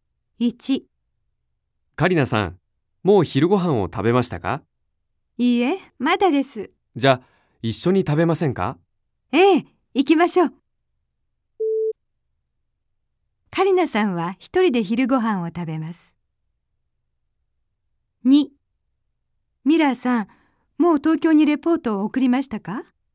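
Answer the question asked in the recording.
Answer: ×(一緒に食べます)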